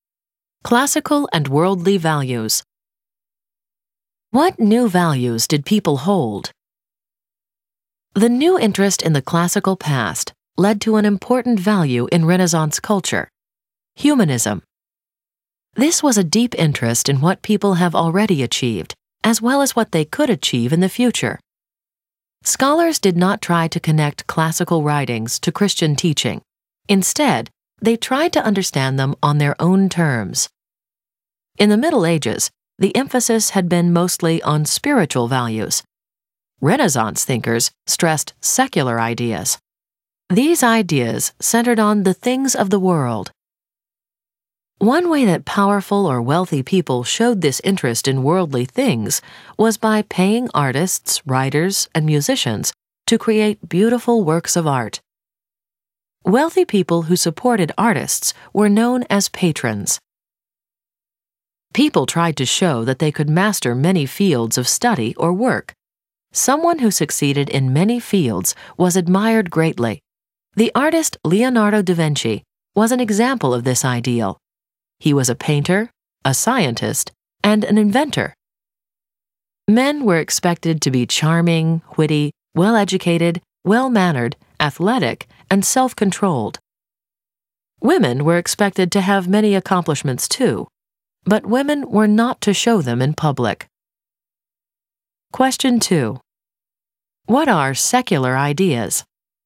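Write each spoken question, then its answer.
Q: What are secular ideas?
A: Ideas centered on the things of the world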